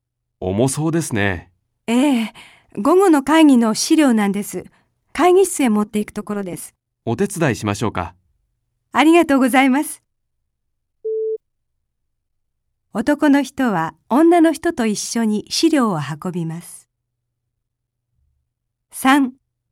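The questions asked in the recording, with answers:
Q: 男の人は女の人と一緒に資料を運びます。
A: ○(正しい)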